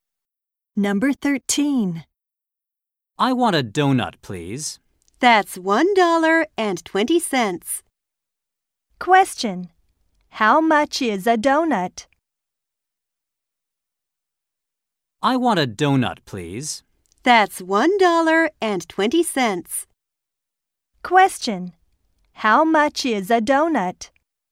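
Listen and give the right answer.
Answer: $1.20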